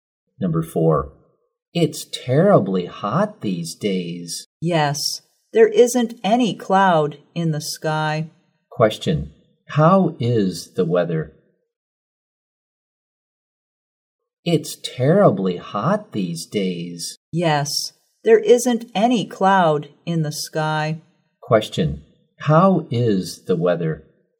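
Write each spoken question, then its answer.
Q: Question, how is the weather?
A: Hot and sunny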